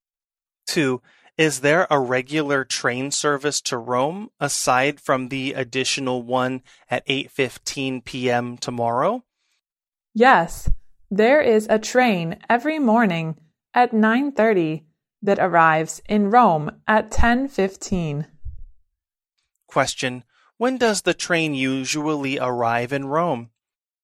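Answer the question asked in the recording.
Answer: At 10:15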